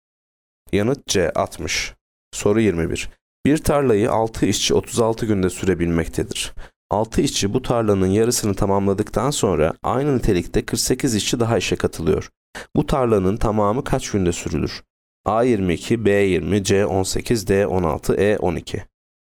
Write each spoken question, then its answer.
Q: Bu tarlanın tamamı kaç günde sürülür?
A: Yanıt B 20.